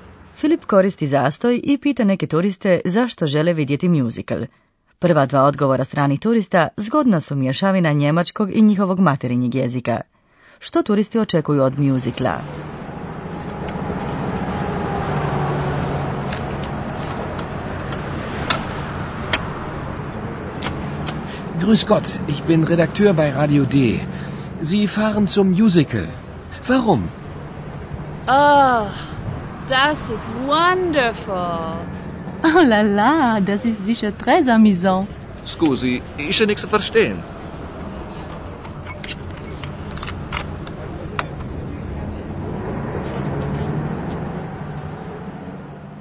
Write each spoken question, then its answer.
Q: Što turisti očekuju od mjuzikla?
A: Turisti imaju pozitivno očekivanja.